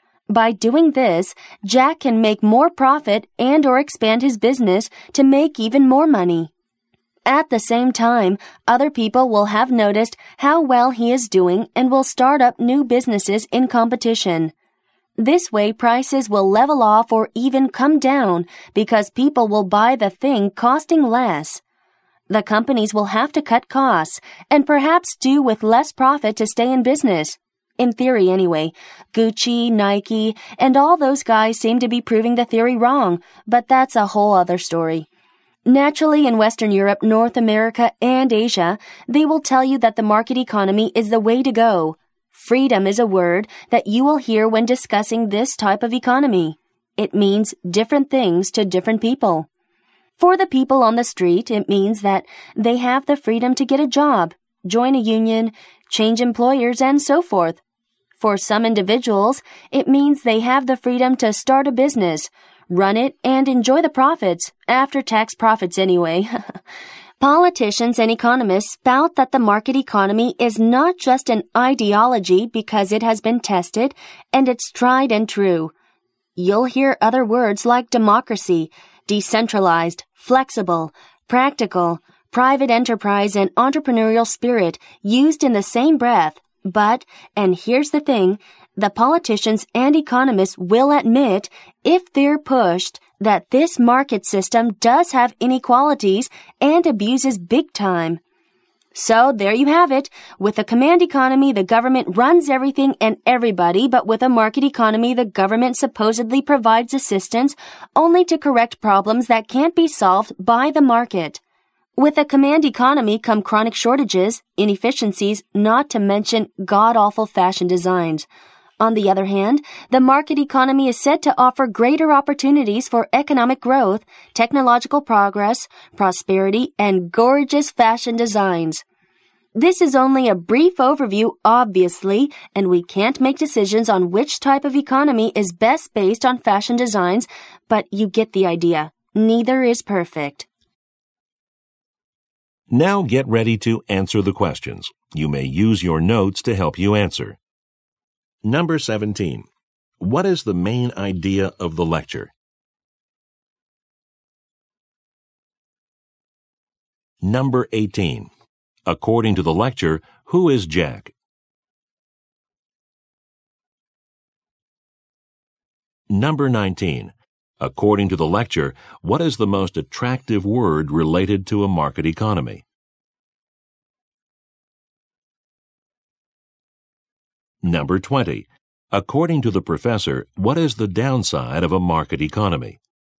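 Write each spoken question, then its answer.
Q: According to the lecture, what is the most attractive word related to a market economy?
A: Freedom

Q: According to the professor, what is the downside of a market economy?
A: It has inequalities and abuses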